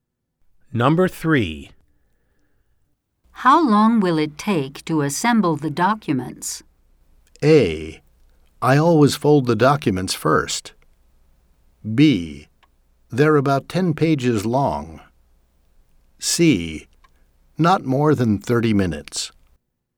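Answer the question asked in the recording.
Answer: C: Not more than 30 minutes.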